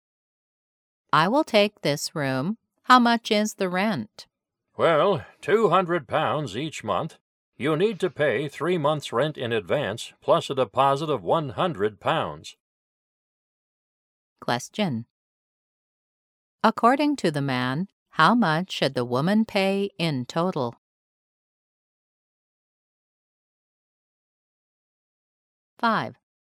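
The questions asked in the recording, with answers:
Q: According to the man, how much should the woman pay in total?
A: £700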